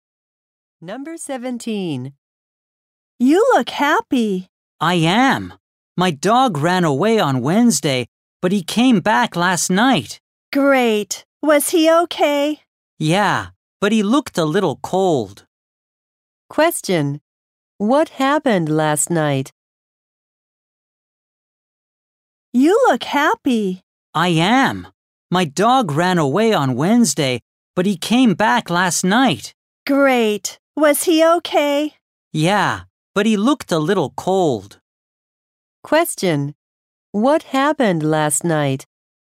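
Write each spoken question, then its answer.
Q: What happened last night?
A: The girl's dog came back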